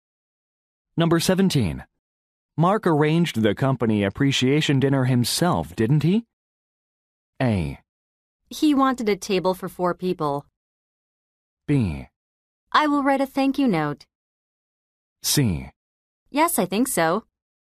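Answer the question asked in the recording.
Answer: C: Yes, I think so.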